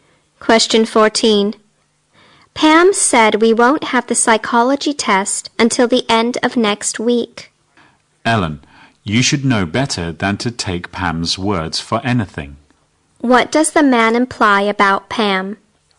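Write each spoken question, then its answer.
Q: What does the man imply about Pam?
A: What Pam says can't be trusted.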